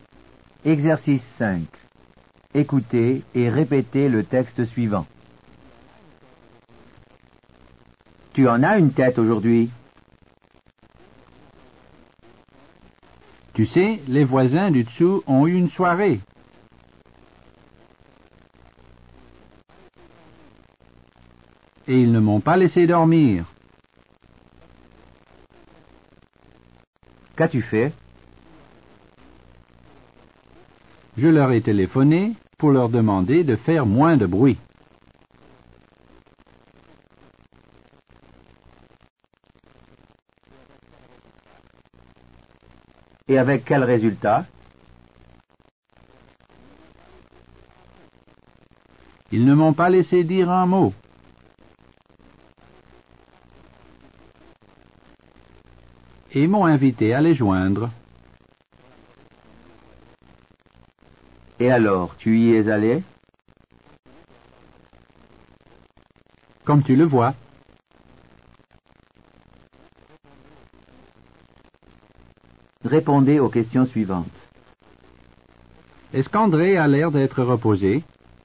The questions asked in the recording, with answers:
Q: Est-ce qu'André a l'air d'être reposé?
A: Non, il a l'air très fatigué.